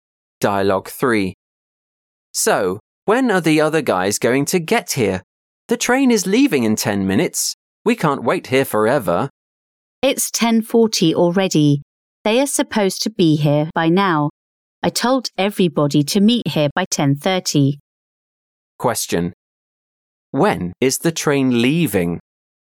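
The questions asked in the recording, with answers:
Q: When is the train leaving?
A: At 10:50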